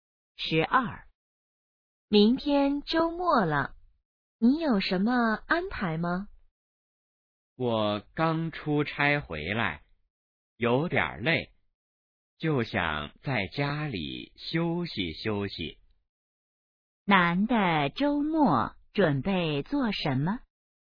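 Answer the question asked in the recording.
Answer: 在家休息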